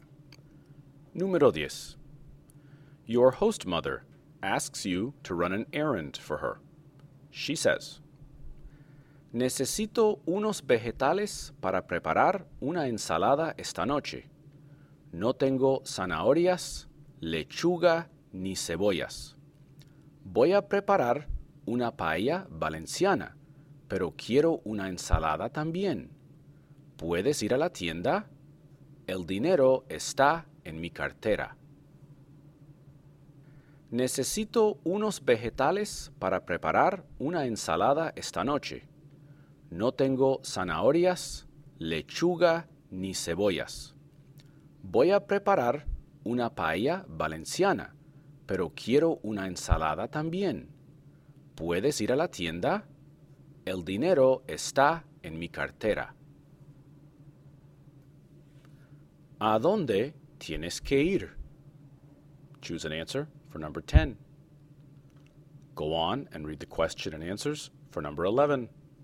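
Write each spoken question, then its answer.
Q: ¿A dónde tienes que ir?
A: A la tienda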